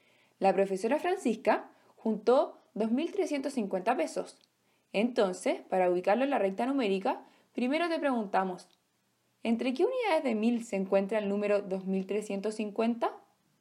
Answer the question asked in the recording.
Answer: entre el 2.000 y el 3.000, ya que 2.350 es mayor a 2.000 pero menor a 3.000.